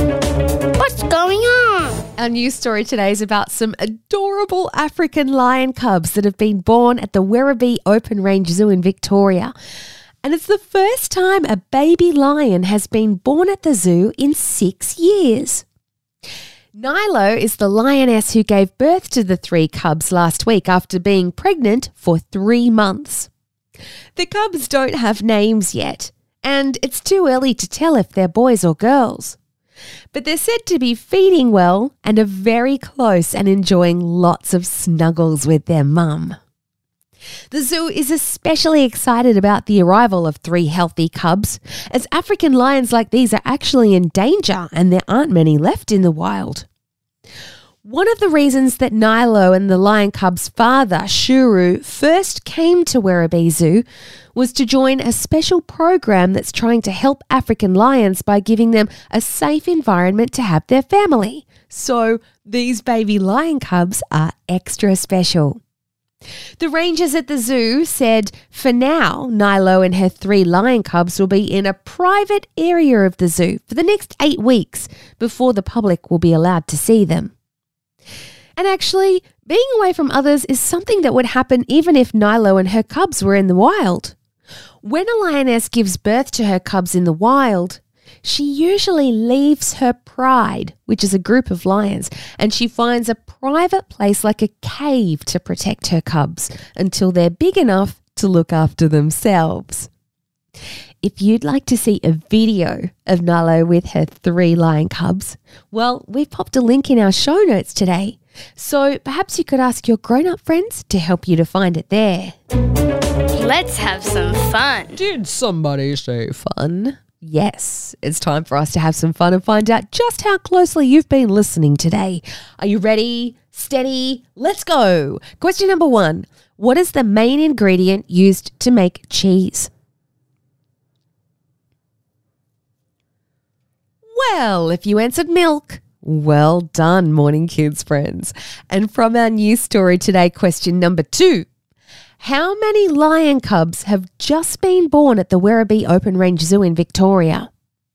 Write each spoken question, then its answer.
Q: How many lion cubs have just been born at the Werribee Open Range Zoo in Victoria?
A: One, two, three is the correct answer.